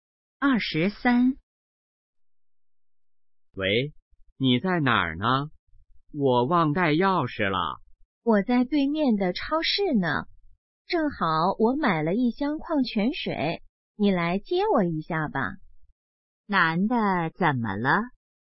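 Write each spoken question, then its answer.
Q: 男的怎么了?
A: 忘带钥匙了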